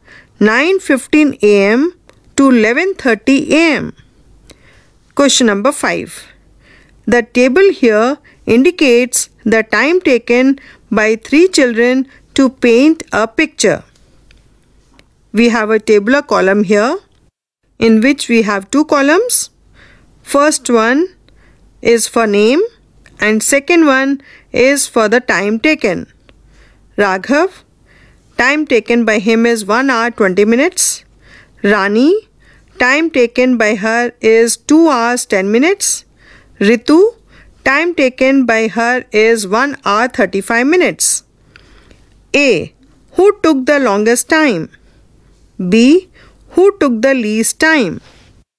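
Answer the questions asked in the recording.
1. Rani
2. Raghav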